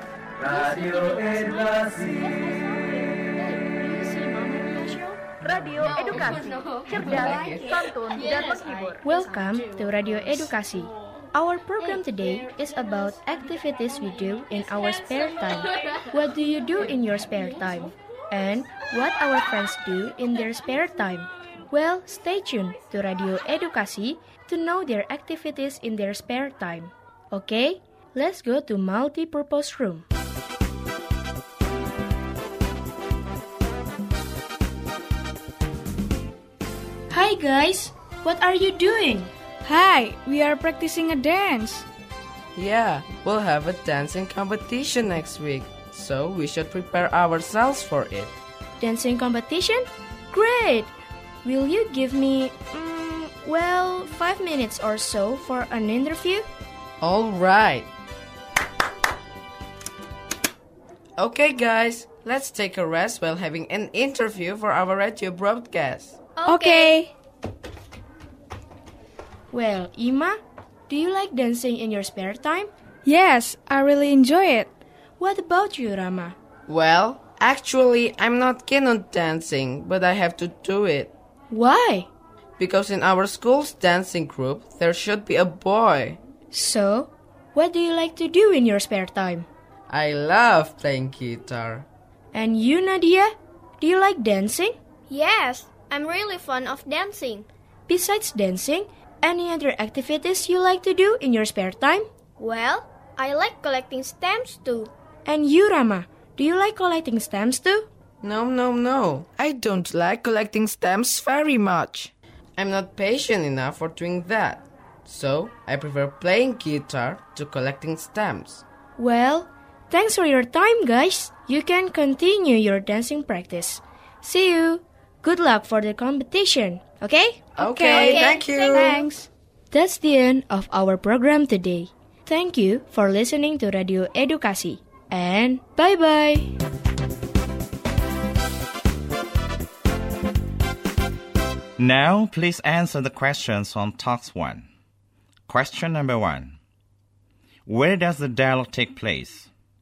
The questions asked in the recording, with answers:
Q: Where does the dialogue take place?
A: The answer is C, at a school multi-purpose room.